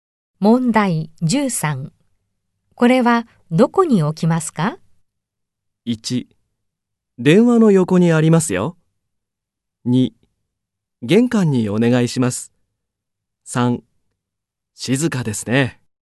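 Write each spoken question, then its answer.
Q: これはどこに置きますか?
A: 3: 玄関にお願いします。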